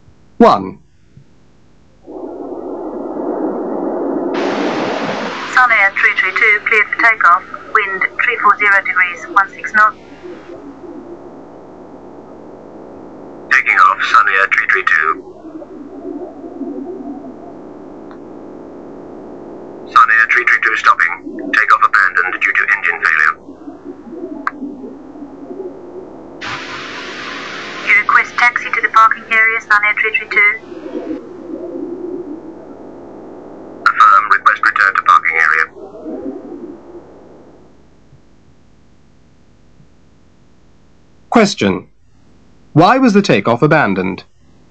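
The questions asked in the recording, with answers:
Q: Why was the takeoff abandoned?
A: Engine failure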